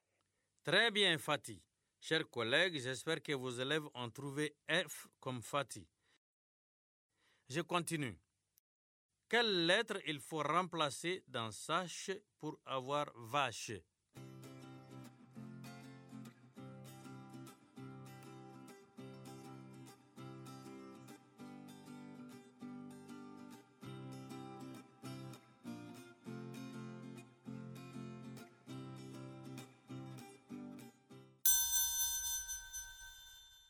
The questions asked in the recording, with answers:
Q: Je continue. Quelle lettre il faut remplacer dans sache pour avoir vache?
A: Monsieur, c'est la lettre S.